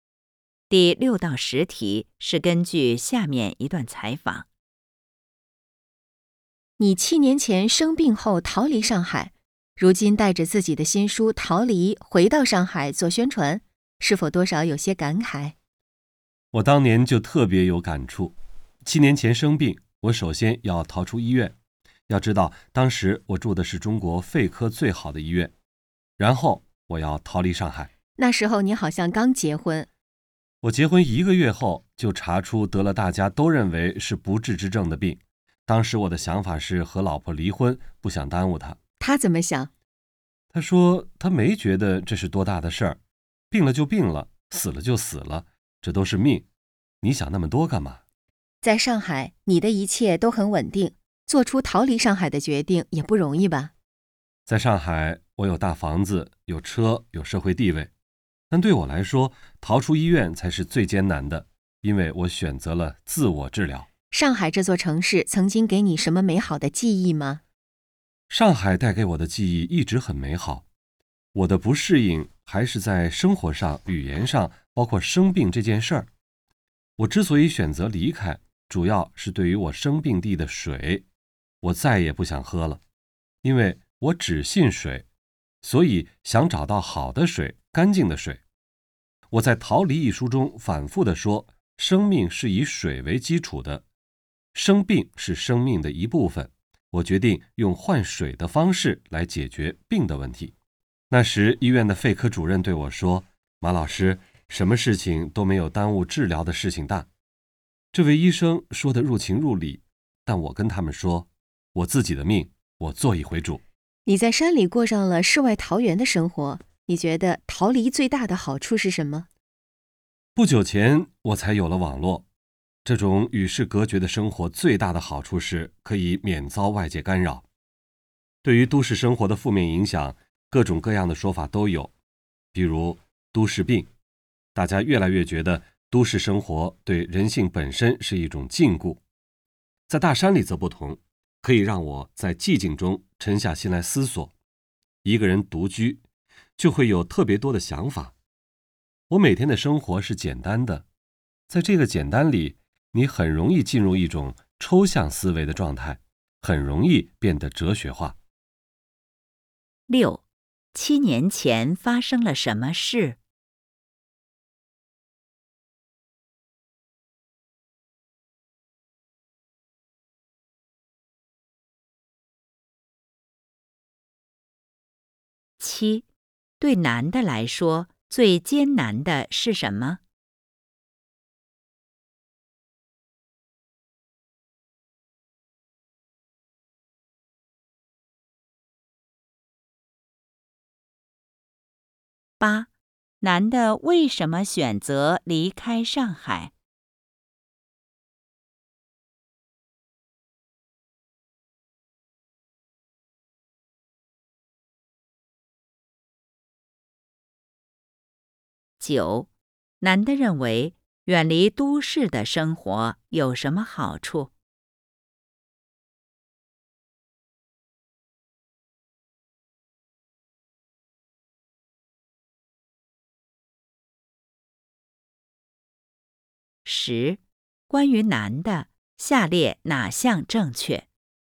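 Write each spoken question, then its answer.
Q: 七年前发生了什么事?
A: 他结婚一个月后生病了(得了被认为是不治之症的病)

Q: 对男的来说,最艰难的是什么?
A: 逃出医院

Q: 男的为什么选择离开上海?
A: 不想再喝生病地的水,想找到好的、干净的水

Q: 男的认为远离都市的生活有什么好处?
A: 可以免遭外界干扰,在寂静中沉下心来思索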